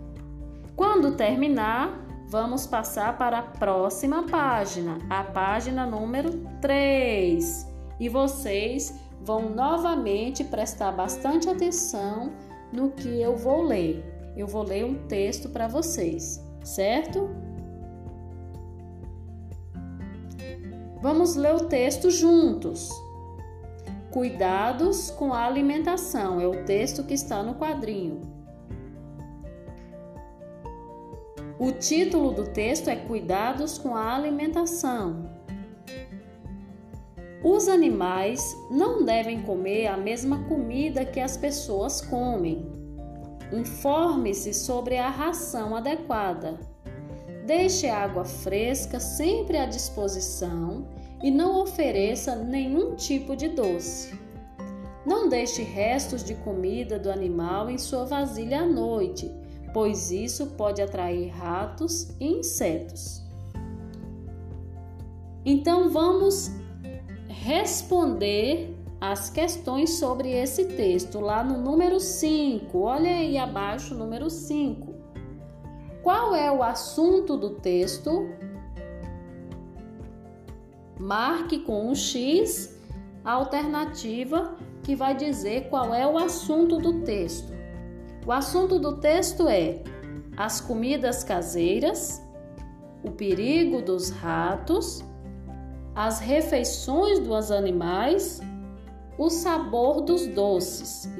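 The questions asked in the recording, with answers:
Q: Qual é o assunto do texto?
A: C: as refeições dos animais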